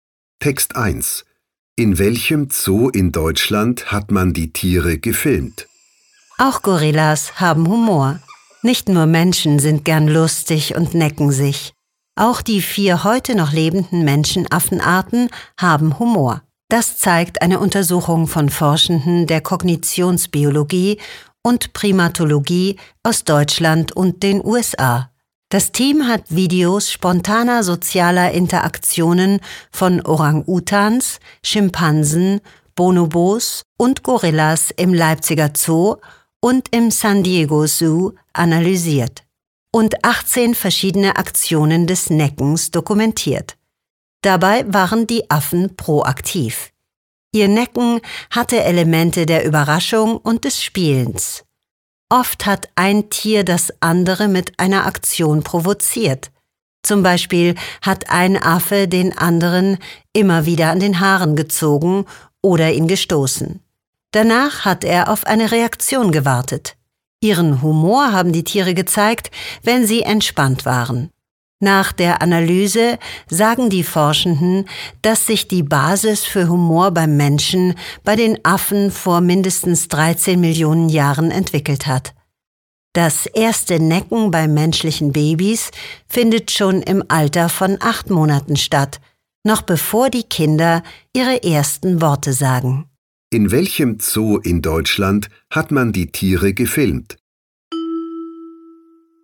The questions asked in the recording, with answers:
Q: In welchem Zoo in Deutschland hat man die Tiere gefilmt?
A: Im Leipziger Zoo hat das Forschungsteam Videos von den Orang-Utans, Schimpansen, Bonobos und Gorillas gemacht.